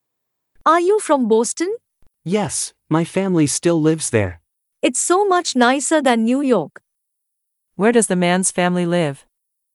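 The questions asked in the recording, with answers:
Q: Where does the man's family live?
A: Boston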